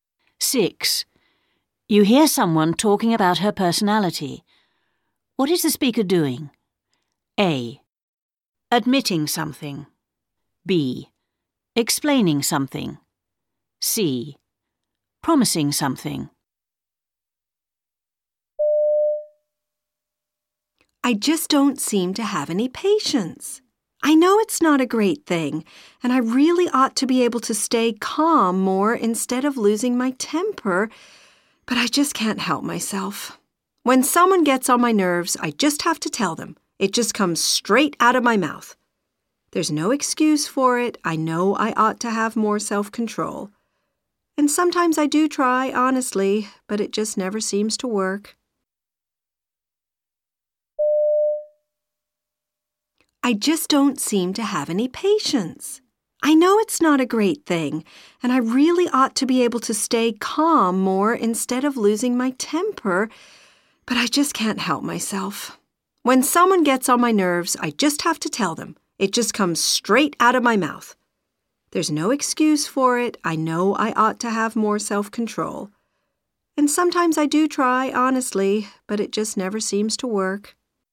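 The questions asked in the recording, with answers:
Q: What is the speaker doing?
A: A: Admitting something.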